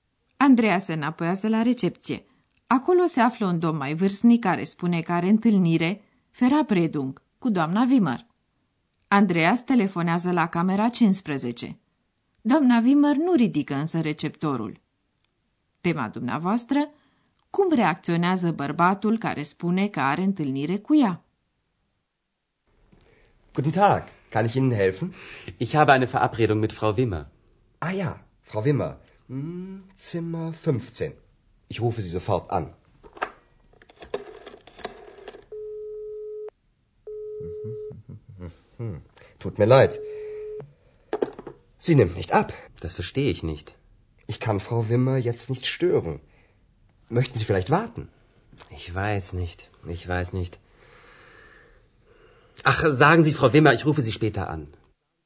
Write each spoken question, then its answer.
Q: Cum reacționează bărbatul care spune că are întâlnire cu ea?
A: Domnului cere lui Andreea să-i comunice doamnei Wimmer că o va suna mai târziu.